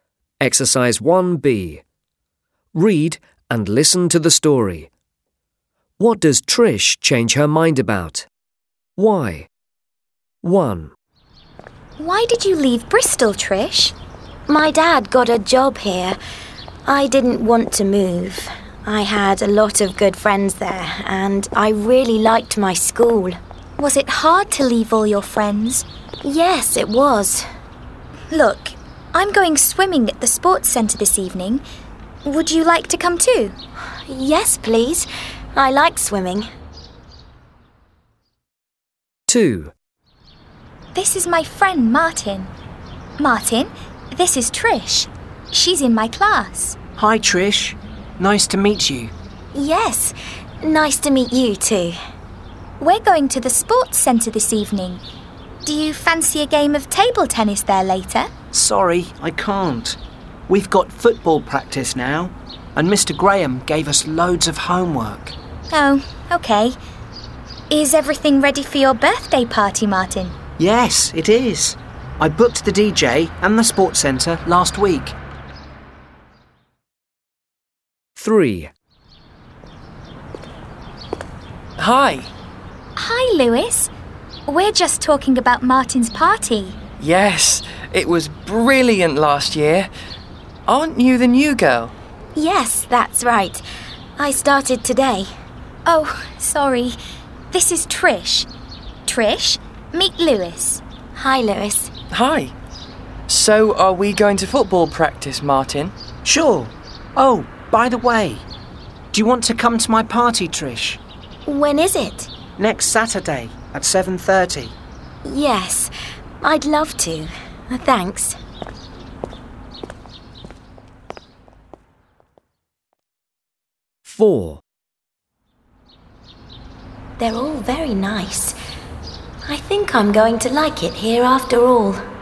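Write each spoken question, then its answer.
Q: What does Trish change her mind about?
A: Moving to her new town: she didn't want to move, but now thinks she's going to like it here.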